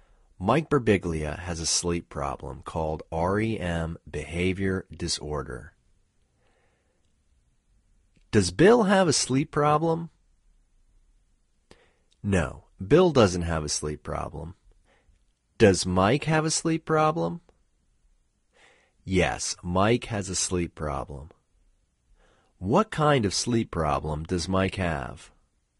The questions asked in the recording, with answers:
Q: What kind of sleep problem does Mike have?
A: Mike has a sleep problem called REM behavior disorder.